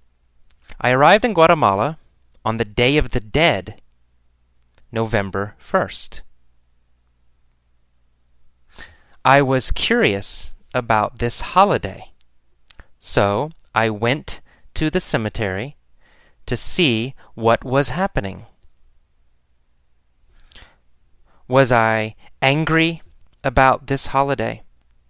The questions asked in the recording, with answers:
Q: Was I angry about this holiday?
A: No, I wasn't angry about this holiday.